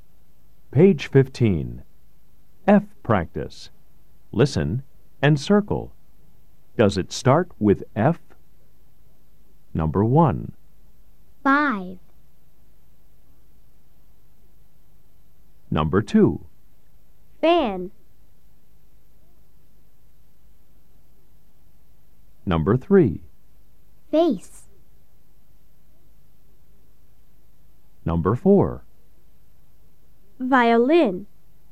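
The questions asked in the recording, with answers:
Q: Does it start with F?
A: Yes (five)

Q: Does it start with F?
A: Yes (fan)

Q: Does it start with F?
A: Yes (face)

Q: Does it start with F?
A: No (violin)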